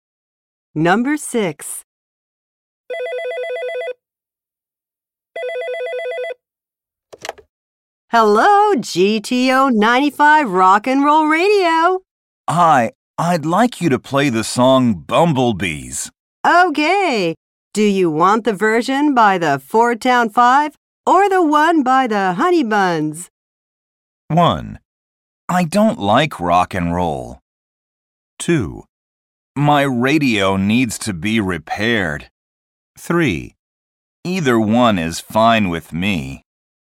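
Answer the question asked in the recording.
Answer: 3: Either one is fine with me.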